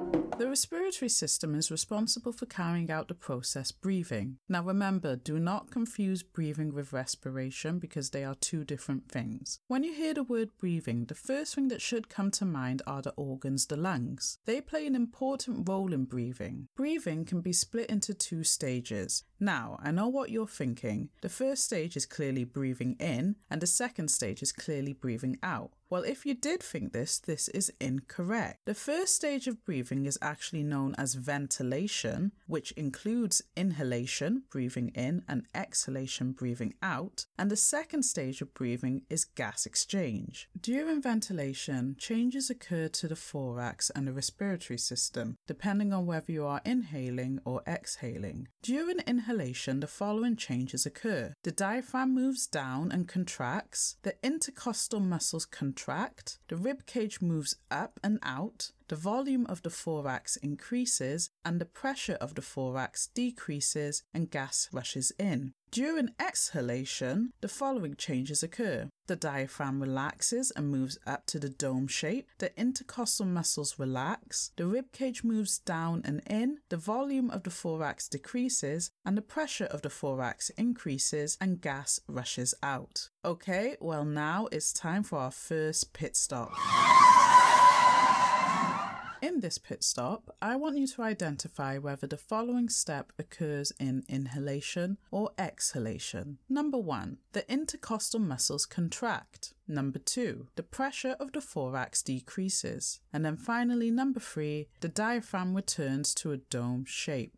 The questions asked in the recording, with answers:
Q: And then finally, number three, the diaphragm returns to a dome shape.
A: This occurs during exhalation.